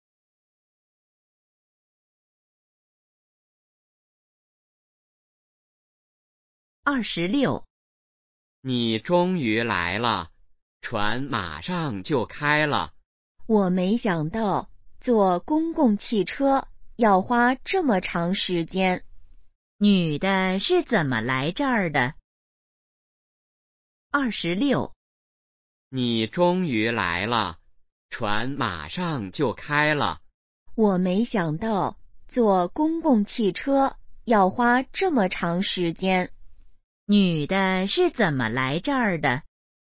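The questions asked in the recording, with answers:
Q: 女的是怎么来这儿的?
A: 坐公共汽车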